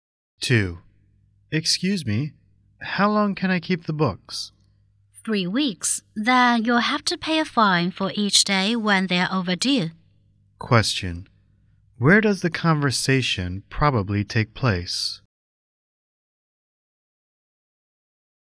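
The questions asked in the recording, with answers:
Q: Where does the conversation probably take place?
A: In a library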